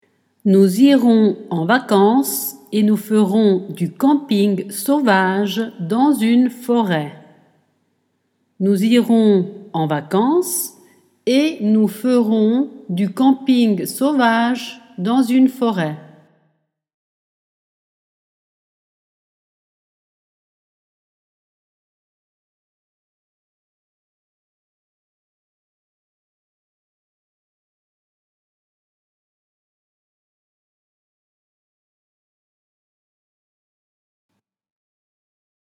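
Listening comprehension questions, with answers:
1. Nous et dans une forêt.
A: irons en vacances / nous ferons du camping sauvage

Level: Dettato di francese A2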